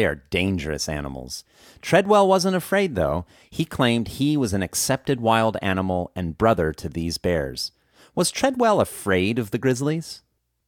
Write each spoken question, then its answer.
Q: Was Treadwell afraid of the grizzlies?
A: No, Treadwell wasn't afraid of the grizzlies.